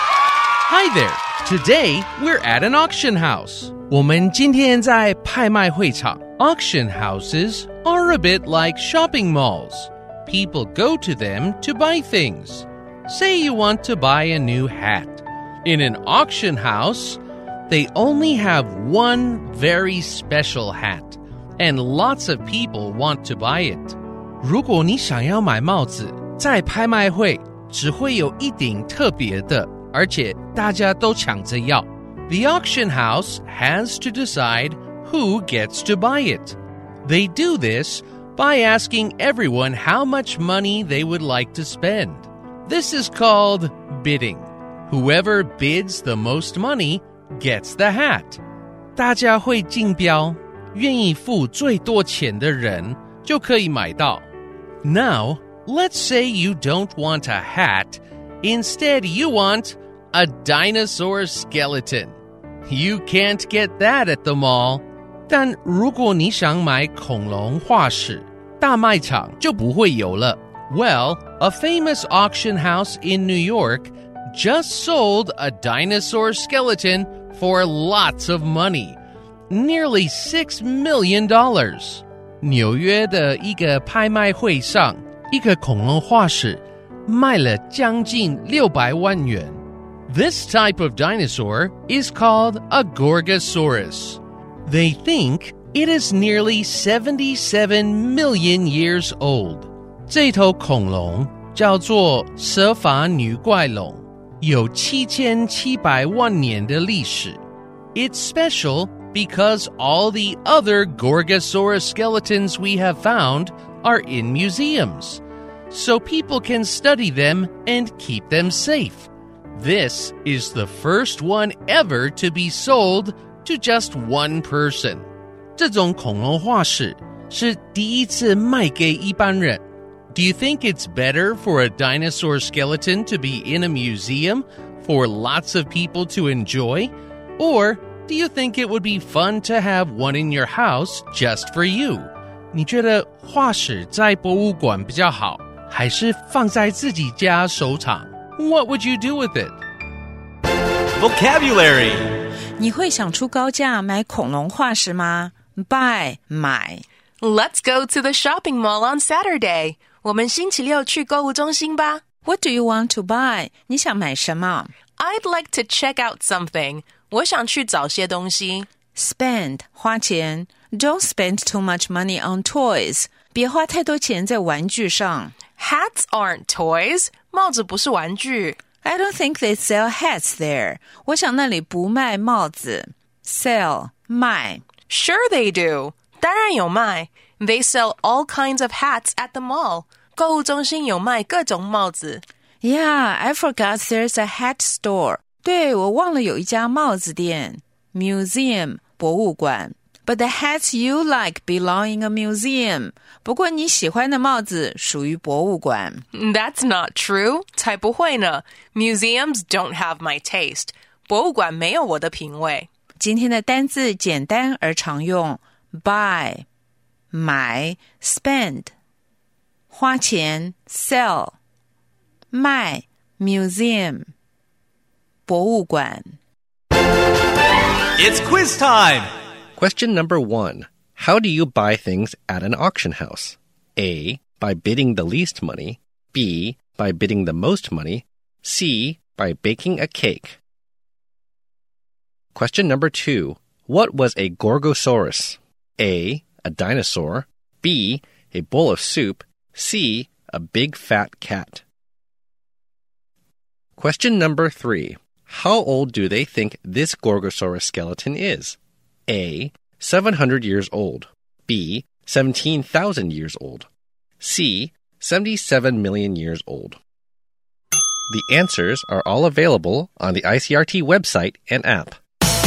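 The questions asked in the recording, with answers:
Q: How do you buy things at an auction house?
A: B: By bidding the most money.

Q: What was a Gorgosaurus?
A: A: A dinosaur.

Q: How old do they think this Gorgosaurus skeleton is?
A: C: 77 million years old.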